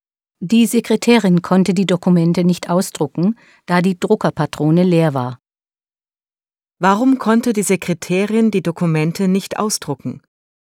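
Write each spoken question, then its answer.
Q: Warum konnte die Sekretärin die Dokumente nicht ausdrucken?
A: Die Druckerpatrone war leer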